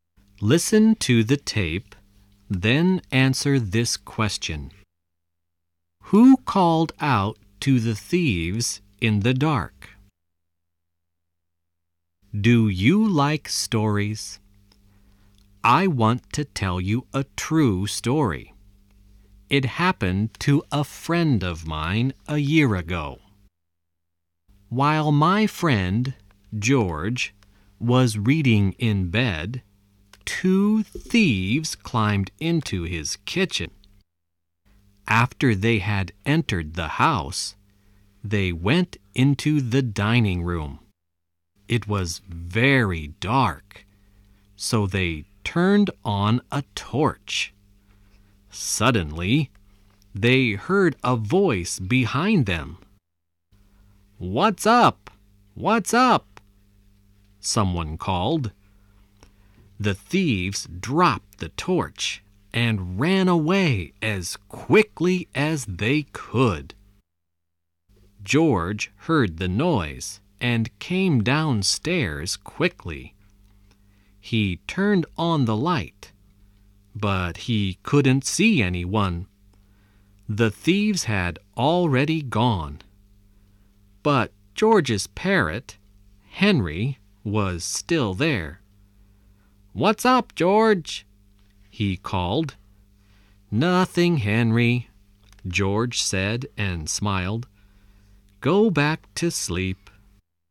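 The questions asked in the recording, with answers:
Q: Who called out to the thieves in the dark?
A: George's parrot, Henry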